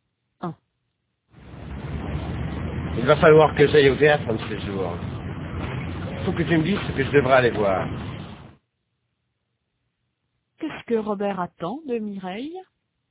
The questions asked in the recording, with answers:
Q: Qu'est-ce que Robert attend de Mireille?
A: Qu'elle lui dise ce qu'il devrait aller voir.